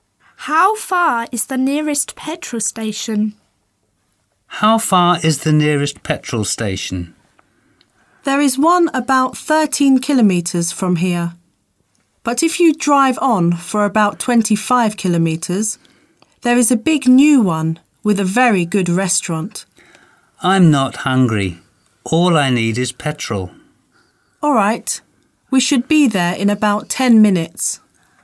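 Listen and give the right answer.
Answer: About 13 kilometres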